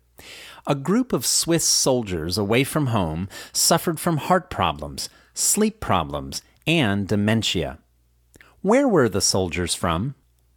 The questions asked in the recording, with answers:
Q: Where were the soldiers from?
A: The soldiers were from Switzerland.